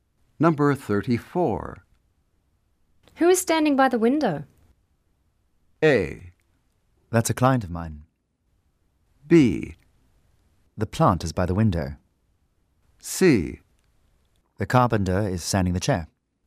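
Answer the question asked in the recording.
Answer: A: That's a client of mine.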